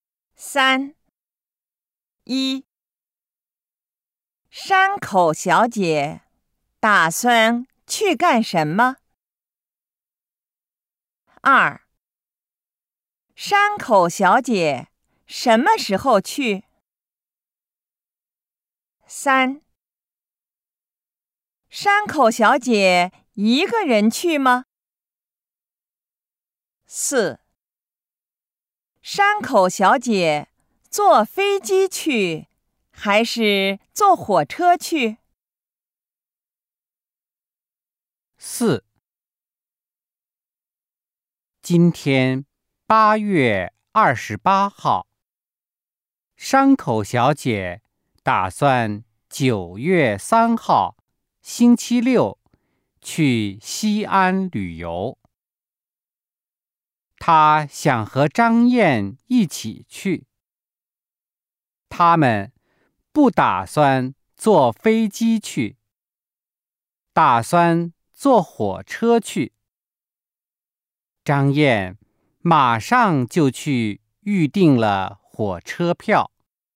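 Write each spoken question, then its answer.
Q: 山口小姐打算去干什么?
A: 去西安旅游

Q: 山口小姐什么时候去?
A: 九月三号星期六

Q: 山口小姐一个人去吗?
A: 不,她想和张燕一起去

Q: 山口小姐坐飞机去还是坐火车去?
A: 坐火车去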